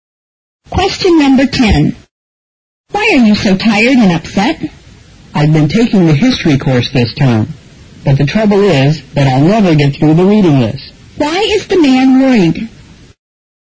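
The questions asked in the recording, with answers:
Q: Why is the man worried?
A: He can't finish the reading list for his history course.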